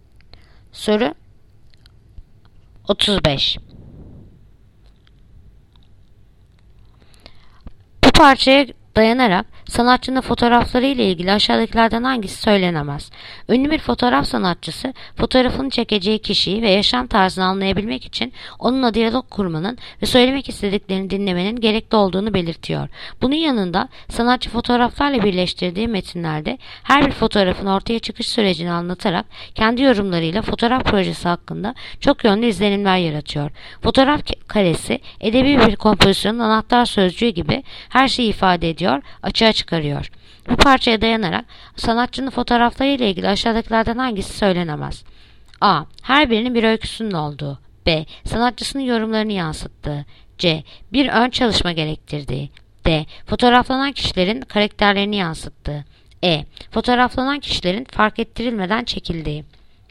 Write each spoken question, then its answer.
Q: Bu parçaya dayanarak sanatçının fotoğrafları ile ilgili aşağıdakilerden hangisi söylenemez?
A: Yanıt Edirne. Fotoğraflanan kişilerin fark ettirilmeden çekildiği.